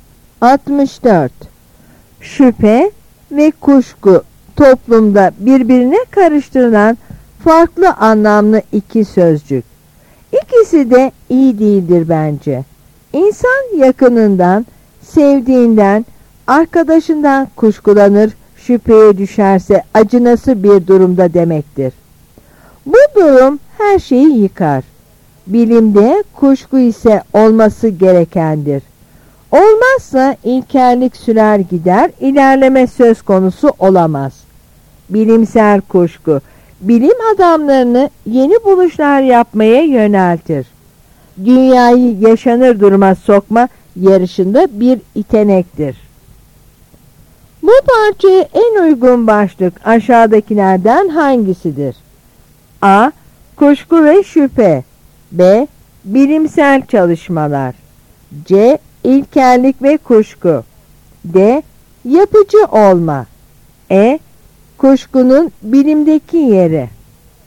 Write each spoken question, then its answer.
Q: Bu parçaya en uygun başlık aşağıdakilerden hangisidir?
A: Yanıt E.